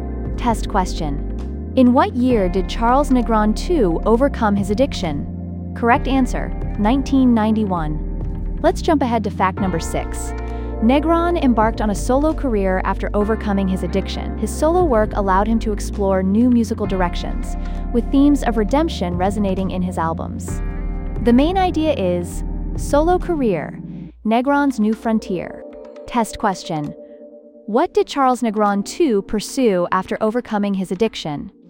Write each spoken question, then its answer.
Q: What did Charles Negron II pursue after overcoming his addiction?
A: Correct answer, a solo career.